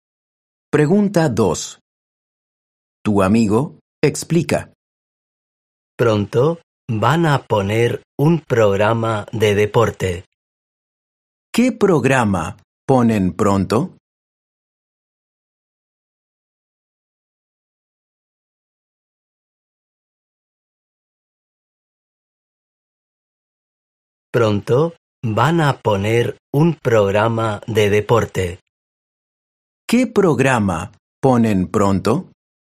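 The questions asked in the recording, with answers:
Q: ¿Qué programa ponen pronto?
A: Un programa de deporte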